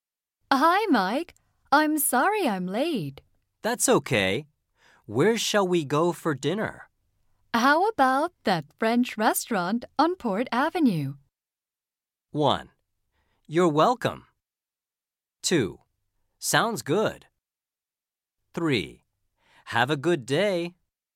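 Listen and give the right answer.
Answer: 2: Sounds good.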